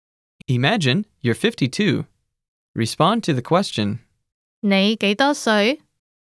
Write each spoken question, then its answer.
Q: 你幾多歲?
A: 我52歲.